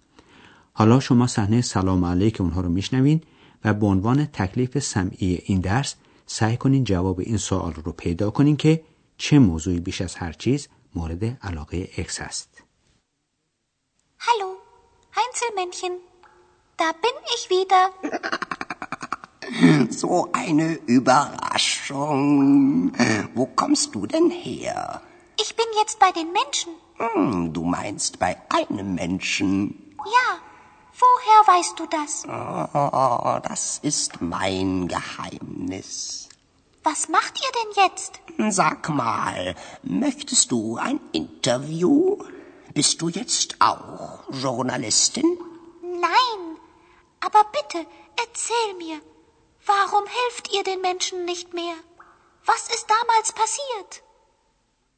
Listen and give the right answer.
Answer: پس موضوع مورد علاقه اکس این بود که بفهمه چرا جنهای کوتوله دیگه به انسانها کمک نمی کنن و همچنین میخواد بدونه که اون وقتا چه اتفاقی افتاده.